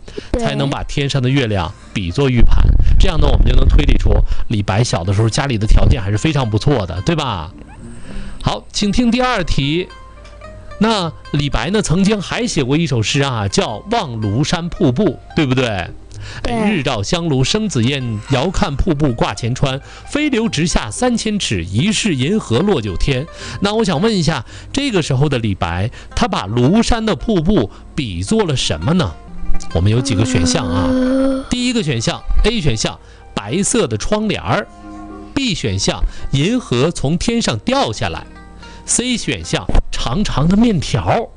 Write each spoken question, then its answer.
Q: 那我想问一下,这个时候的李白,他把庐山的瀑布比作了什么呢?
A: 银河从天上掉下来。